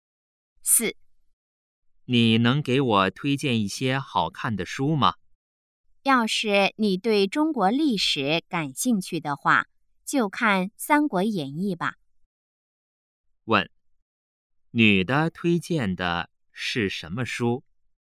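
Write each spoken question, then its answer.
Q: 问,女的推荐的是什么书?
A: 《三国演义》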